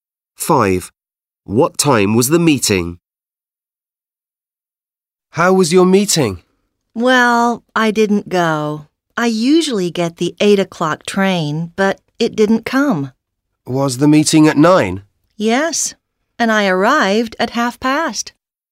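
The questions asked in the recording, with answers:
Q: What time was the meeting?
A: 9 o'clock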